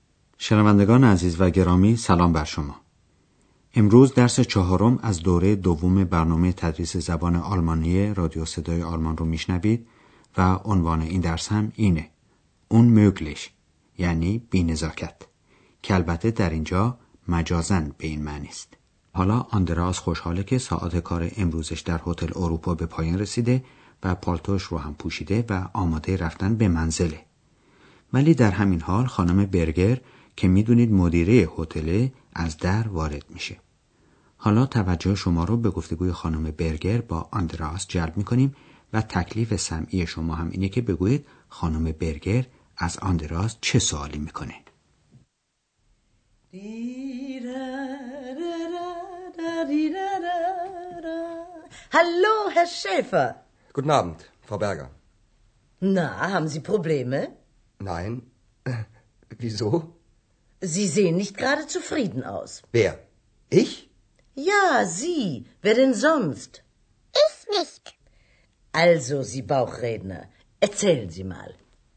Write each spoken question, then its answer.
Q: تکلیف سمعی شما هم اینه که بگویید خانم برگر از آندراس چه سوالی میکنه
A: پس سوال خانم برگر از آندراس این بود که آیا او مشکل و مسئله ای داره؟